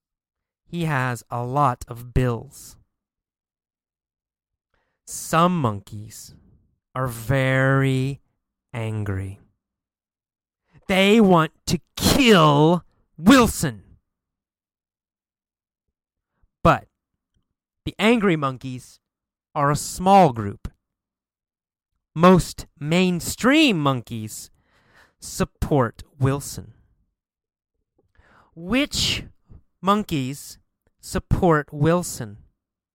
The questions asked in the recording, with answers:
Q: Which monkeys support Wilson?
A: The mainstream monkeys support Wilson.